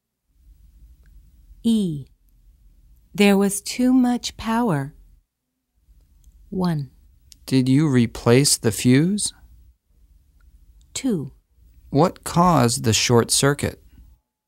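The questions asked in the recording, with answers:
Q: There was too much power.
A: 2: What caused the short circuit?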